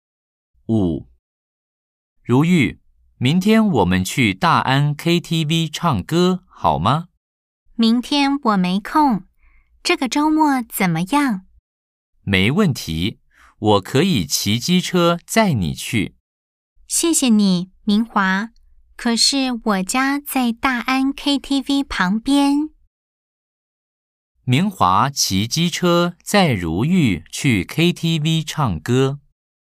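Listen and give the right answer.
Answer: X (错)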